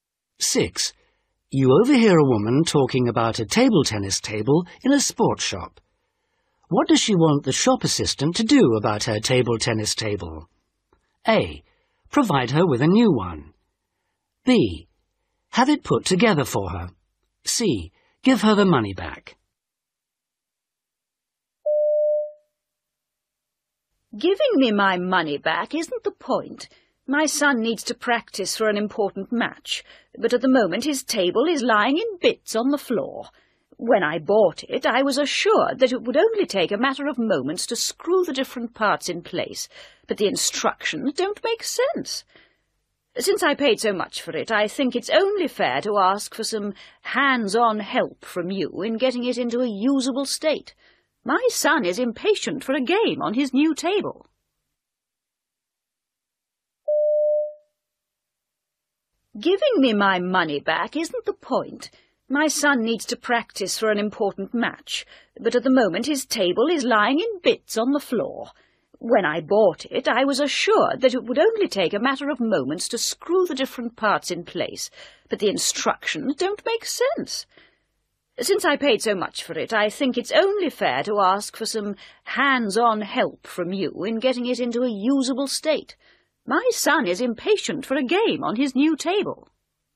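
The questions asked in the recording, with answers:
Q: What does she want the shop assistant to do about her table tennis table?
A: B: Have it put together for her.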